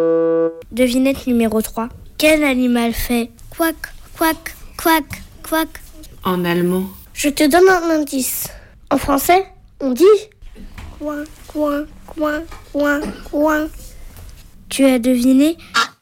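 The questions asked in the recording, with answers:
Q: Quel animal fait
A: le canard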